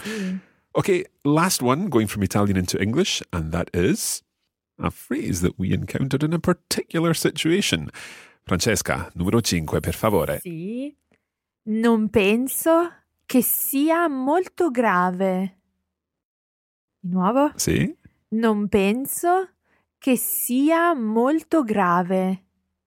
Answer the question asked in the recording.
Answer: I don't think it's very serious.